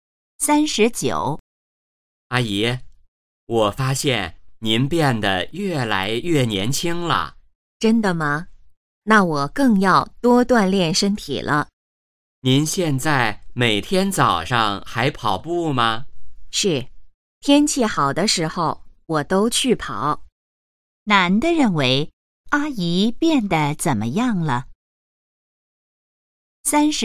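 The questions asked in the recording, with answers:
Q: 男的认为阿姨变得怎么样了?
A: 越来越年轻了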